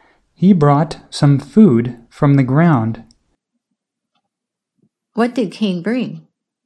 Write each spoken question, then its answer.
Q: What did Cain bring?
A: Cain brought some food.